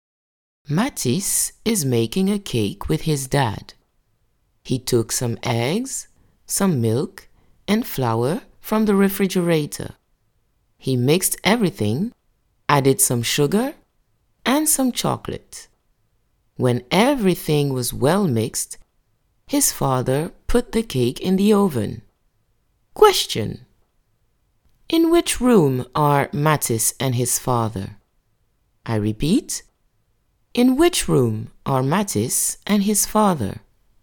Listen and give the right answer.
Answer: Matisse and his father are in the kitchen.